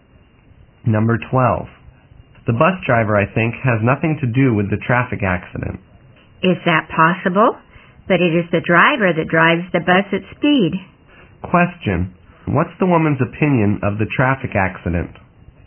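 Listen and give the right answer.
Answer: She thinks the driver is responsible because he drove too fast.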